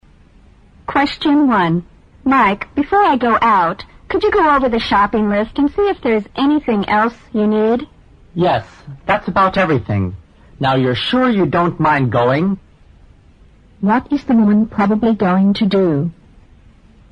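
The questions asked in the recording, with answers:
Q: What is the woman probably going to do?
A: Go shopping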